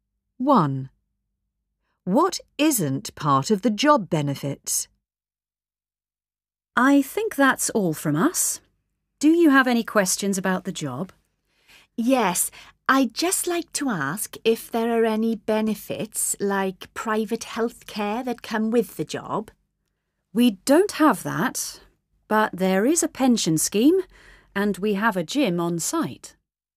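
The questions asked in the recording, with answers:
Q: What isn't part of the job benefits?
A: private health care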